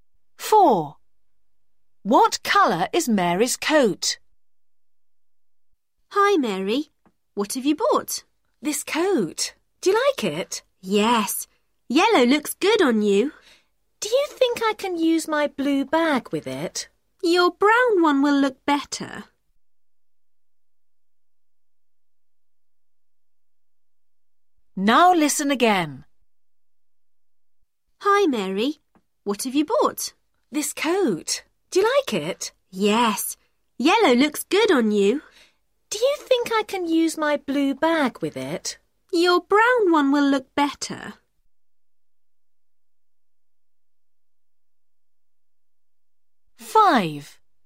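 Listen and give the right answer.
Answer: yellow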